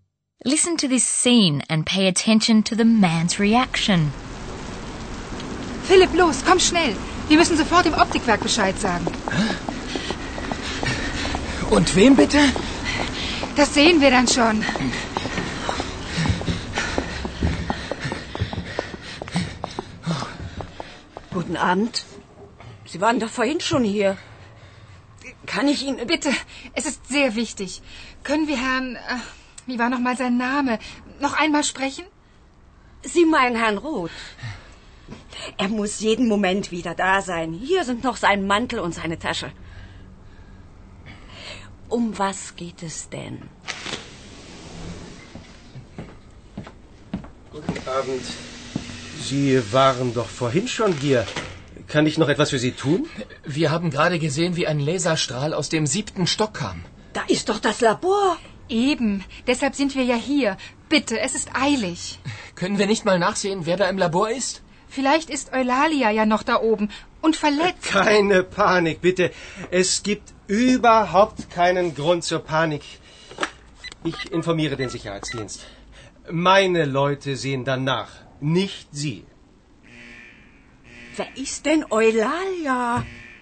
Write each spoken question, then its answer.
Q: Listen to this scene and pay attention to the man's reaction.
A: The man reacts calmly, or at least he pretends to be calm.